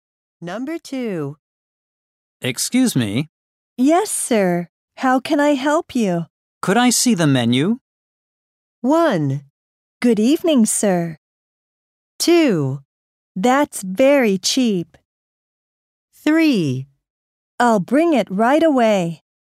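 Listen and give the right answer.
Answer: 3: I'll bring it right away.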